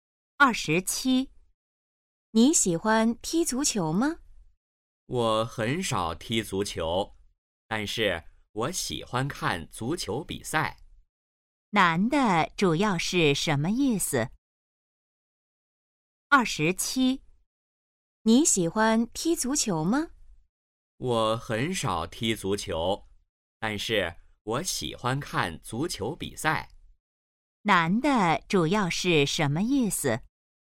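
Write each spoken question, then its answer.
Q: 男的主要是什么意思?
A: 喜欢看足球比赛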